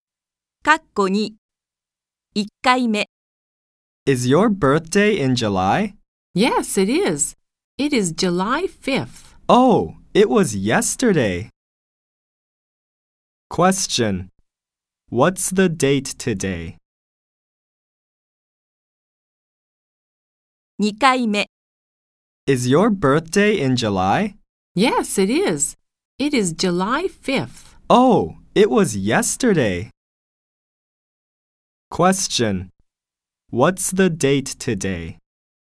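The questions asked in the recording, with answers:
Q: What's the date today?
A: July 6th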